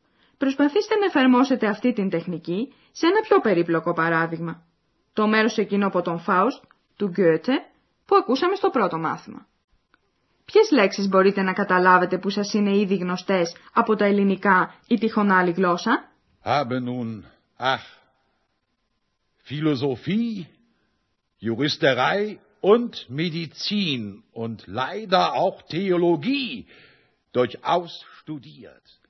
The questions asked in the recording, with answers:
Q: Ποιες λέξεις μπορείτε να καταλάβετε που σας είναι ήδη γνωστές από τα ελληνικά ή τυχόν άλλη γλώσσα?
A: Μπορέσατε να διακρίνετε λέξεις όπως φιλοσοφία, φιλοσοφία, ιατρική, μεντιτσίν, θεολογία, θεολογία.